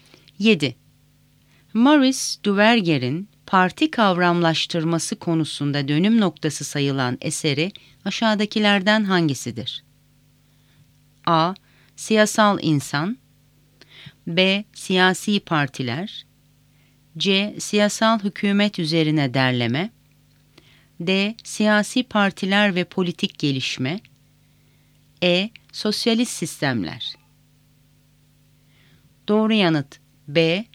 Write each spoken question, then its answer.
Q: Maurice Duverger'in parti kavramlaştırması konusunda dönüm noktası sayılan eseri aşağıdakilerden hangisidir?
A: Doğru yanıt B. Siyasi Partiler.